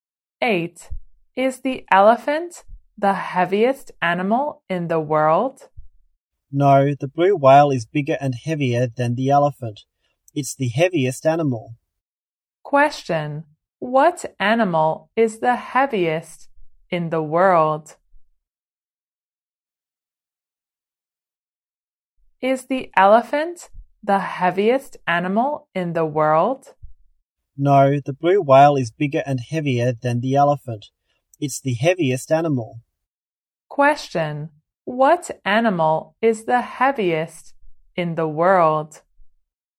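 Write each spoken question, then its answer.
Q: What animal is the heaviest in the world?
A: The blue whale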